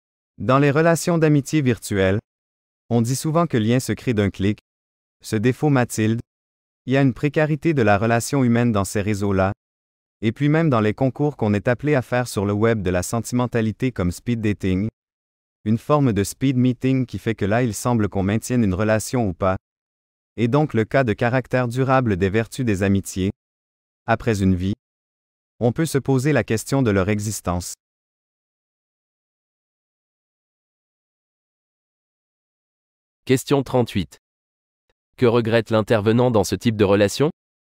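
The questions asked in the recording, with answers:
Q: Que regrette l'intervenant dans ce type de relation ?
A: La précarité de la relation humaine, son manque de caractère durable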